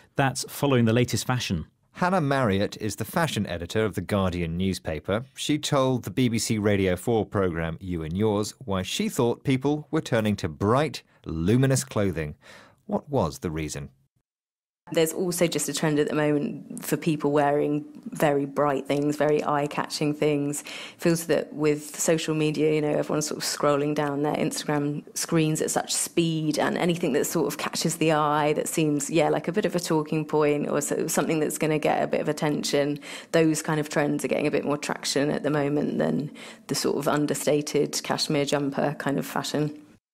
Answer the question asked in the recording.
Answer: So her reason is social media.